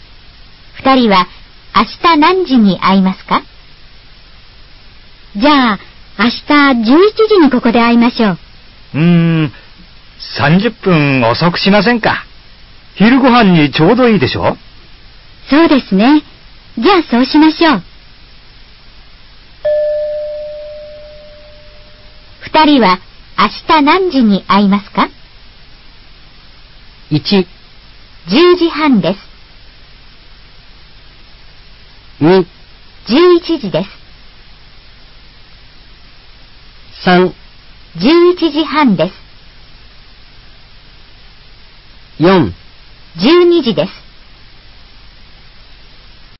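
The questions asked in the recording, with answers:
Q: 二人は明日何時に会いますか?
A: 3: 11時半です。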